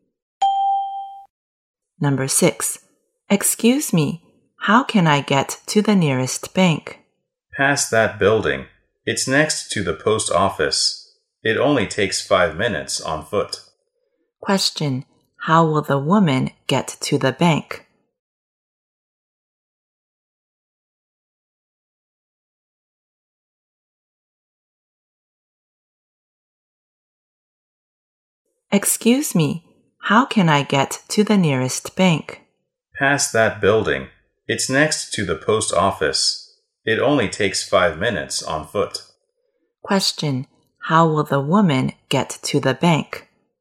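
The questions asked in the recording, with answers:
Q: How will the woman get to the bank?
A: On foot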